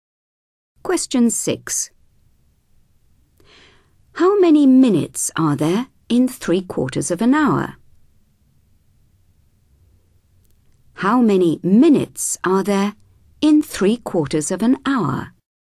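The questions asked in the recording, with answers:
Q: How many minutes are there in 3/4 of an hour?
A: 45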